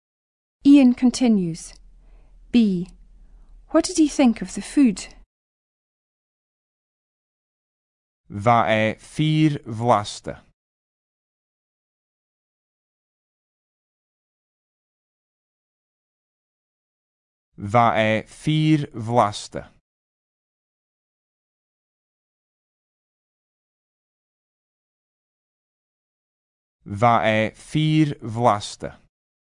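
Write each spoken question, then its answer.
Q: What did he think of the food?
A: It was very tasty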